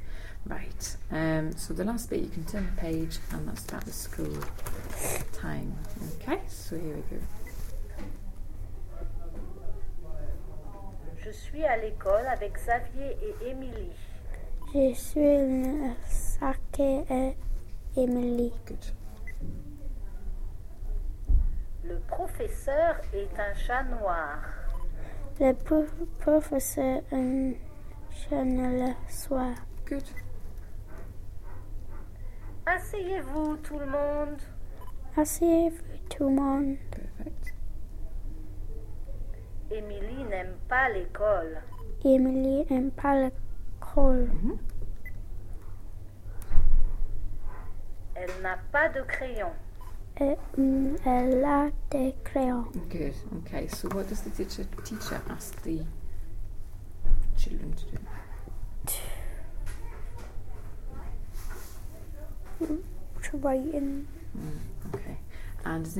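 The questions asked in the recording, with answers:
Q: So what does the teacher ask the children to do?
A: Sit down

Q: And does Emily like school?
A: No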